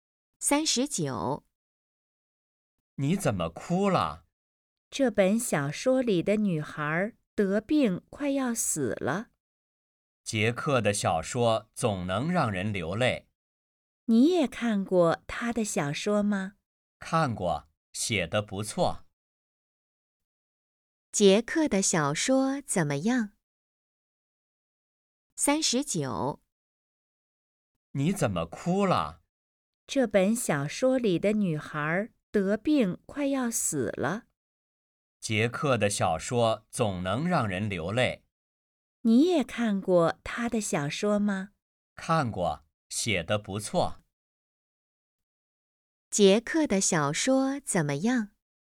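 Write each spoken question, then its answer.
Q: 杰克的小说怎么样?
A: 写得不错,让人流泪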